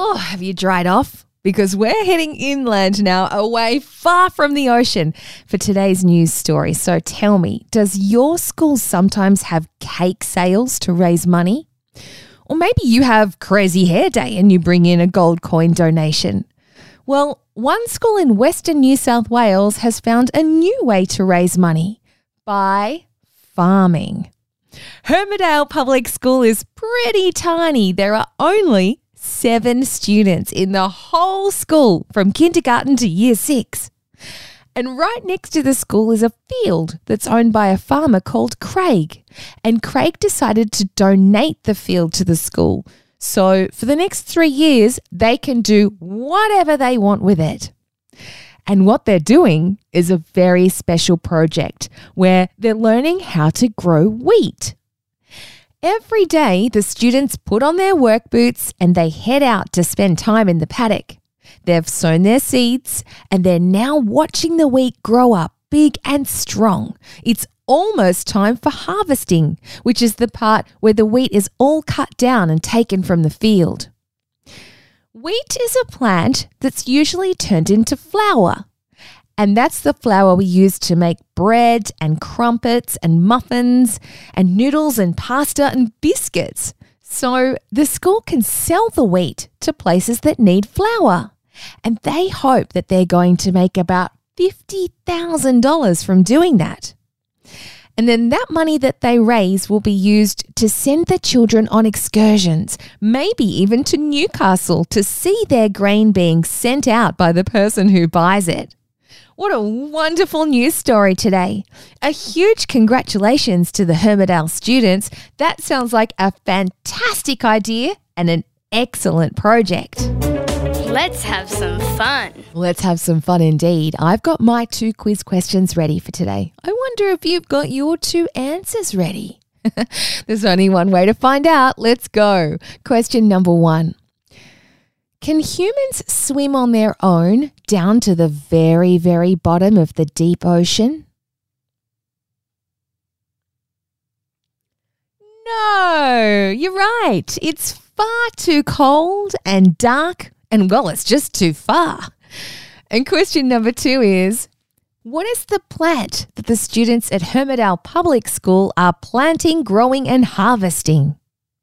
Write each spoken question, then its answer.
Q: what is the plant that the students at Hermitdale Public School are planting, growing, and harvesting?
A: Wheat. Well done, everybody.